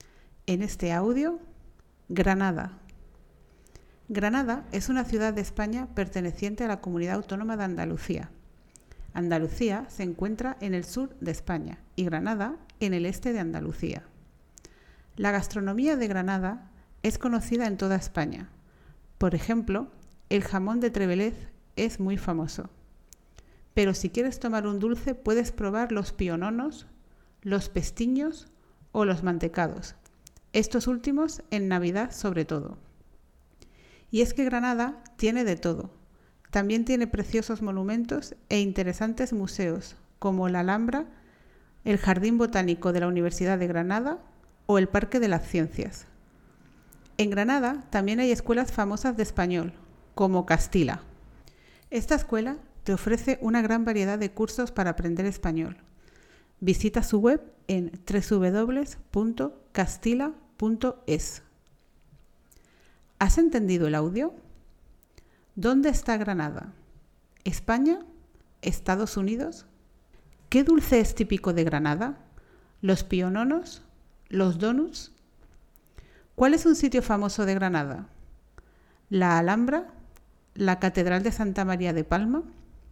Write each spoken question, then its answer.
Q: ¿Dónde está Granada?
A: España

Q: ¿Qué dulce es típico de Granada?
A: los piononos

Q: ¿Cuál es un sitio famoso de Granada?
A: la Alhambra